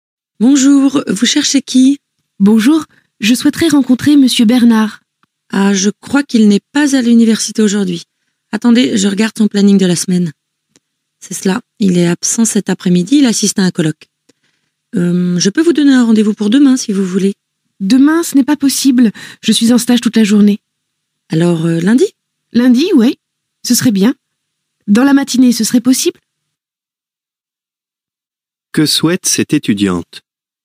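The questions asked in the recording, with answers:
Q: Que souhaite cette étudiante ?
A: Rencontrer Monsieur Bernard (prendre rendez-vous avec lui)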